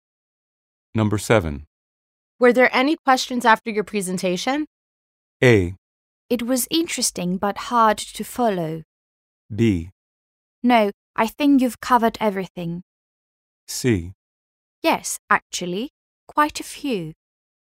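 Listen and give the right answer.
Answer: C: Yes, actually, quite a few.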